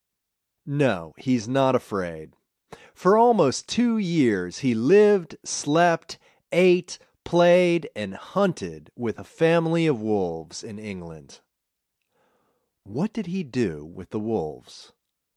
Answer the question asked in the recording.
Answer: He lived, slept, ate, played, and hunted with wolves.